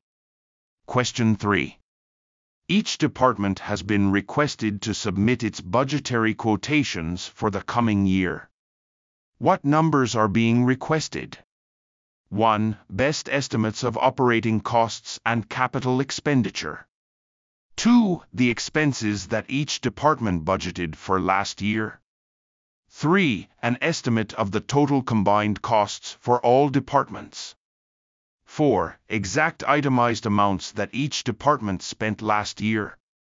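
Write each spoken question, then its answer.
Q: What numbers are being requested?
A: 1: Best estimates of operating costs and capital expenditure.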